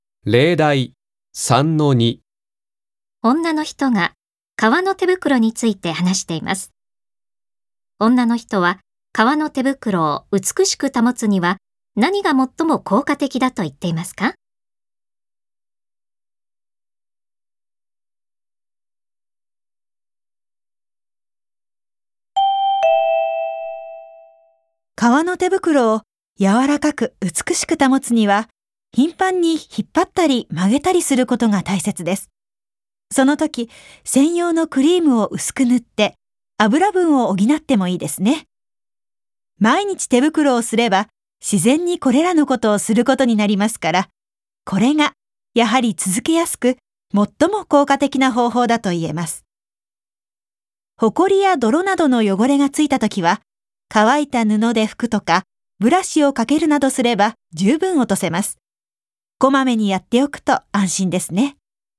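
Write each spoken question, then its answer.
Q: 女の人は革の手袋を美しく保つには何が最も効果的だと言っていますか?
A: 毎日手袋をすること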